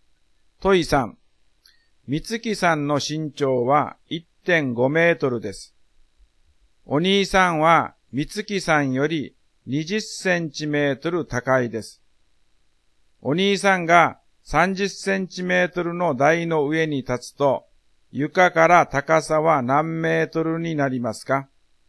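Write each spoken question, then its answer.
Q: お兄さんが30センチメートルの台の上に立つと、床から高さは何メートルになりますか?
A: 2メートル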